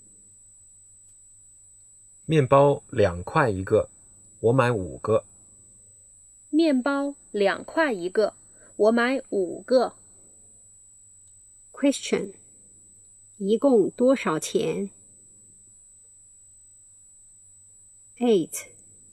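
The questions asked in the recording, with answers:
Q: 一共多少钱?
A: 十块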